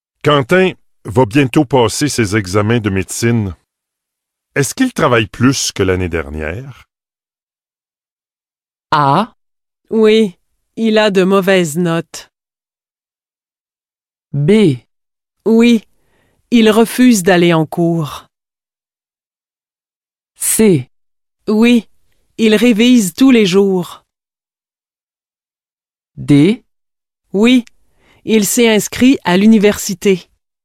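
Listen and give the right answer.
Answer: C: Oui, il révise tous les jours.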